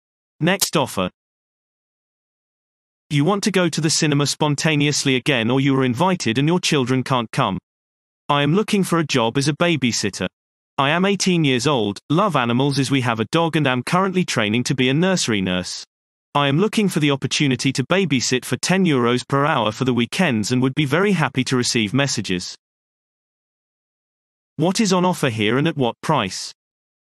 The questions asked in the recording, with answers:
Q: What is on offer here and at what price?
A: Response. Childcare is offered at weekends for €10 per hour.